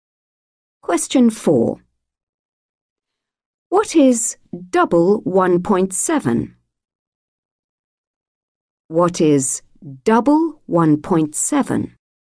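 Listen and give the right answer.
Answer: 3.4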